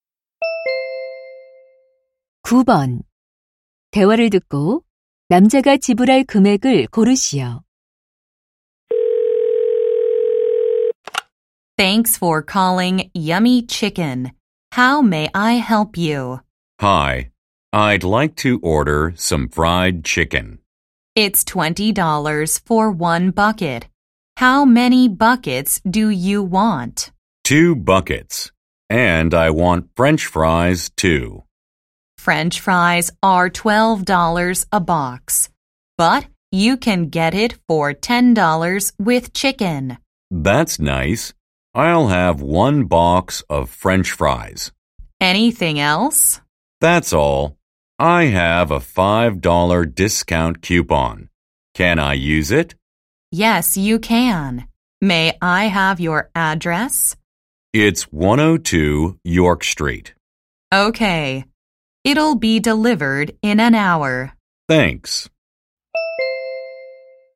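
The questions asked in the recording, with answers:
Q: 남자가 지불할 금액을 고르시오.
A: $45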